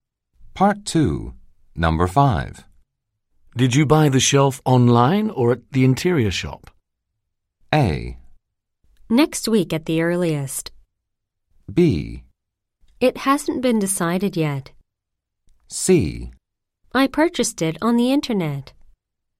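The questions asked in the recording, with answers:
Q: Did you buy the shelf online or at the interior shop?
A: C: I purchased it on the internet.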